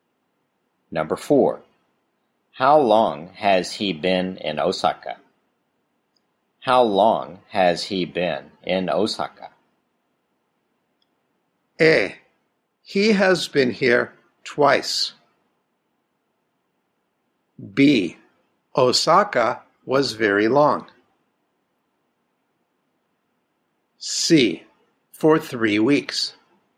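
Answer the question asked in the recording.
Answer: C: For 3 weeks.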